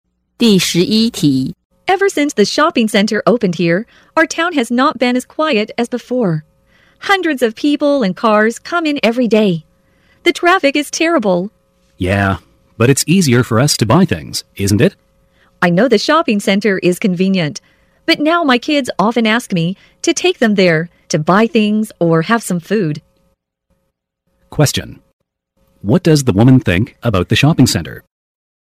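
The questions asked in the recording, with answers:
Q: What does the woman think about the shopping center?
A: It's convenient but has brought problems like noise, traffic and her kids wanting to go there.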